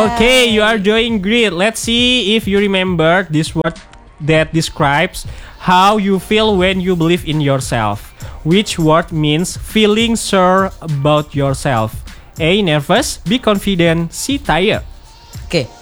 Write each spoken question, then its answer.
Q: Which word means feeling sure about yourself?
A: B. Confident.